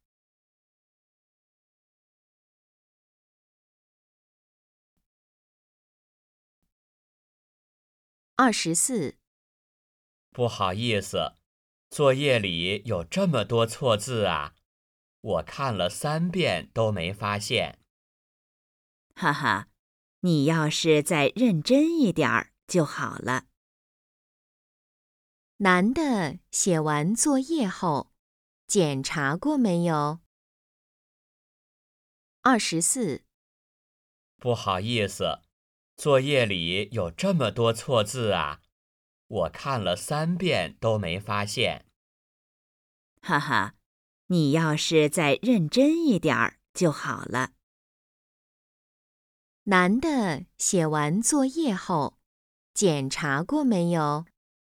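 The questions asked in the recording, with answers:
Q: 男的写完作业后,检查过没有?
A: 检查过,看了三遍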